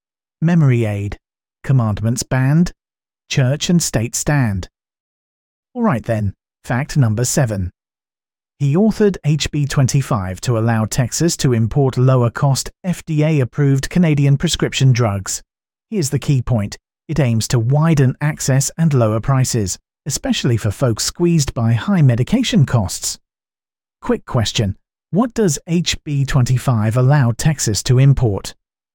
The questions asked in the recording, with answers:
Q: What does HB 25 allow Texas to import?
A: Correct answer, Canadian prescription drugs.